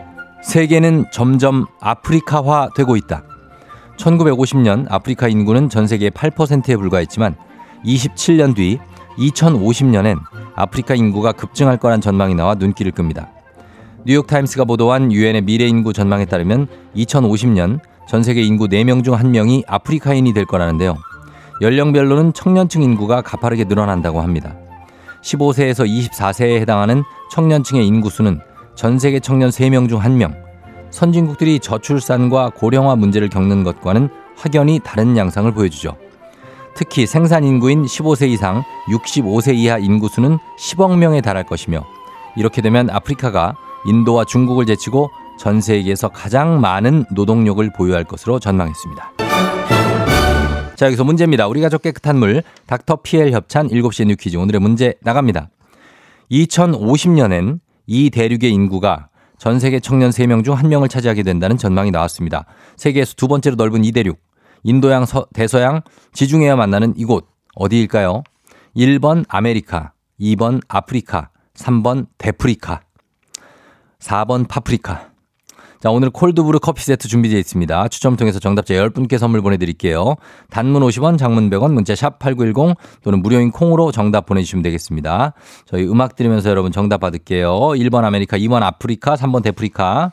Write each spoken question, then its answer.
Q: 세계에서 두 번째로 넓은 이 대륙, 인도양, 서, 대서양, 지중해와 만나는 이곳 어디일까요?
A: 정답은 2번 아프리카입니다.